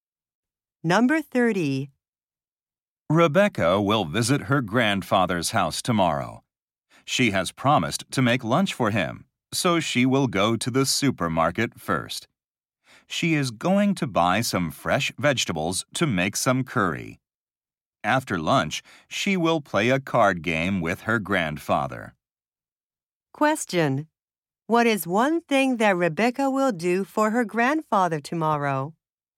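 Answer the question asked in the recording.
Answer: Make curry for his lunch.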